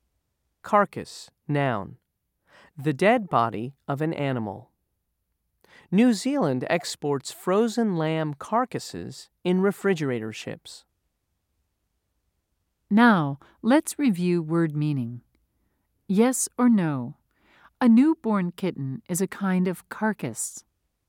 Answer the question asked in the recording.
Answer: If you said no, you're right.